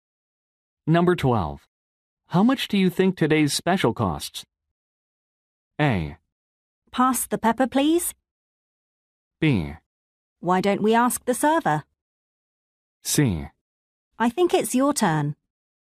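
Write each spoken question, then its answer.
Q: How much do you think today's special costs?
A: B: Why don't we ask the server?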